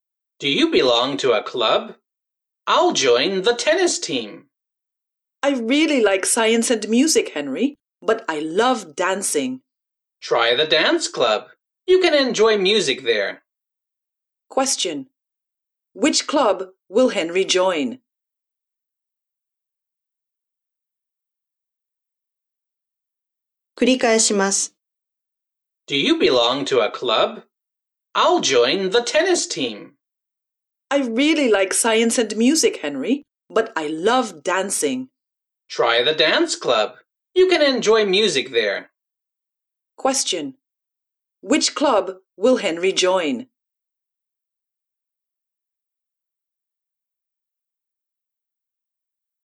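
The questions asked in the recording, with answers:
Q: Which club will Henry join?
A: The tennis team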